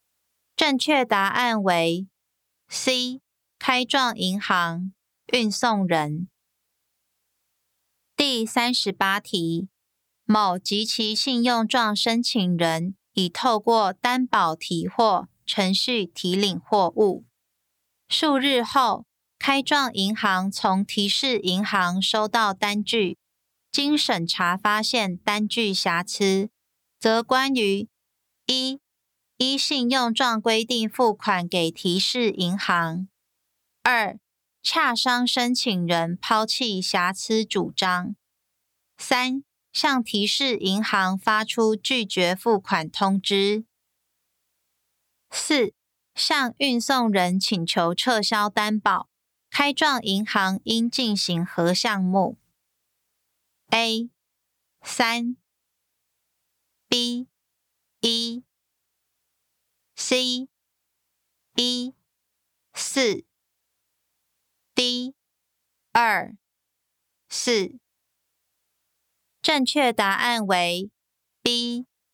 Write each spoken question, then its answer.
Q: 开状银行应进行何项目 ?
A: 正确答案为 B.